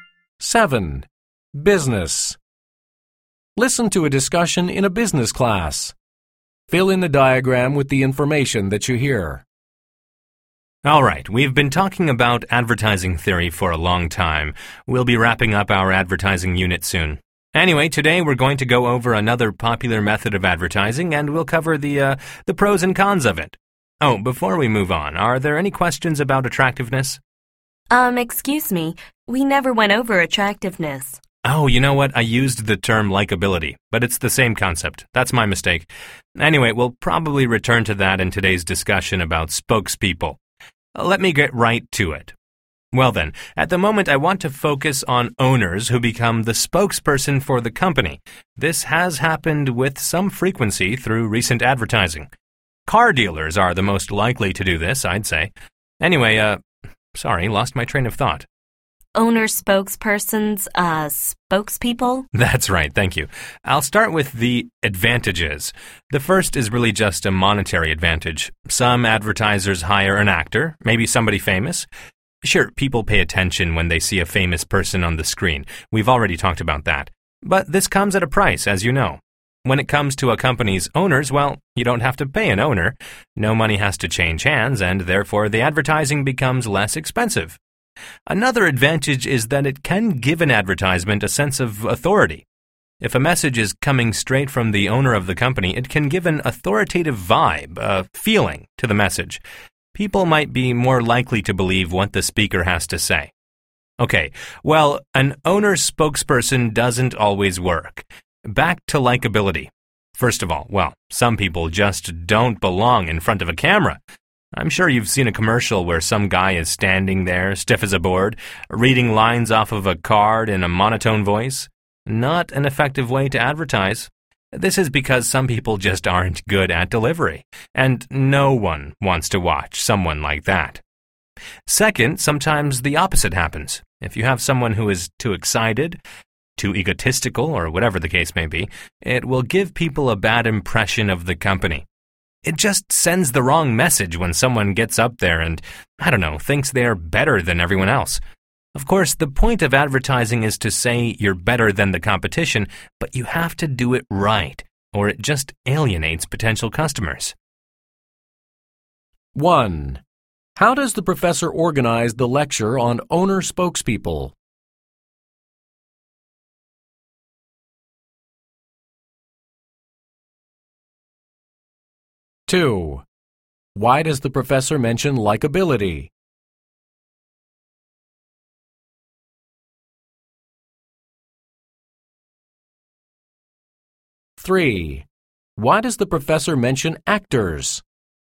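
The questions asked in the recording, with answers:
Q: How does the professor organize the lecture on owner spokespeople?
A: He describes the advantages first, then the disadvantages

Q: Why does the professor mention actors?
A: To contrast their cost with owners, who don't have to be paid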